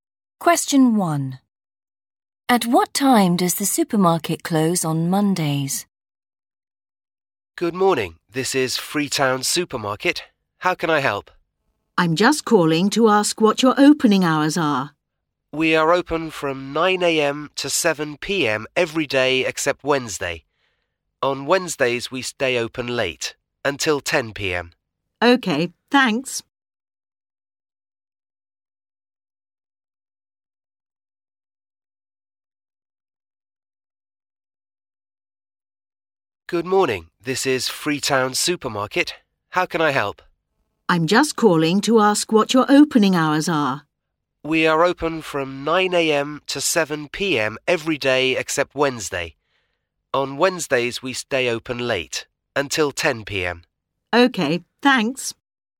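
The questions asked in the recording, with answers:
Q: At what time does the supermarket close on Mondays?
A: 7 p.m.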